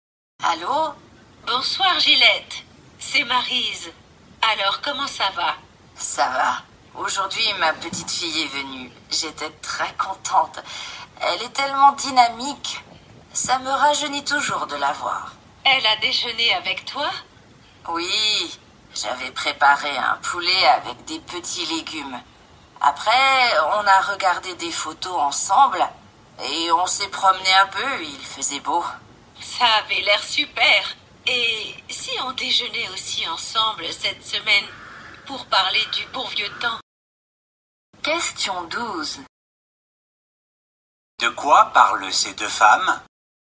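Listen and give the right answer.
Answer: De la visite de la petite-fille de l'une d'elles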